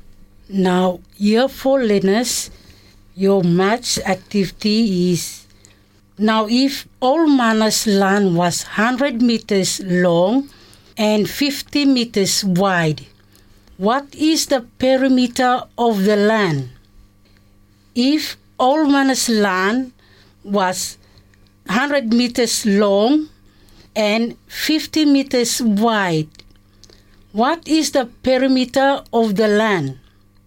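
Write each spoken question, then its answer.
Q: What is the perimeter of the land?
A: 300 meters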